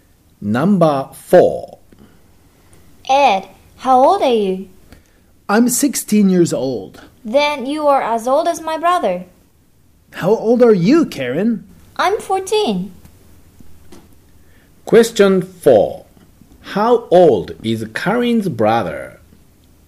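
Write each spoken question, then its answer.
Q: How old is Karen's brother?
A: 16 years old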